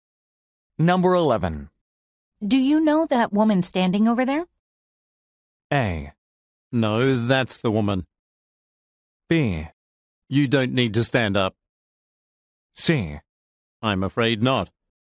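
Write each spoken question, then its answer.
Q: Do you know that woman standing over there?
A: C: I'm afraid not.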